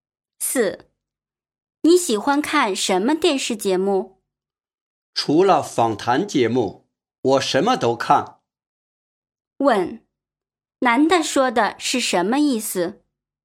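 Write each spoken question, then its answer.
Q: 男的说的是什么意思?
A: 他不喜欢看访谈节目,其他节目都看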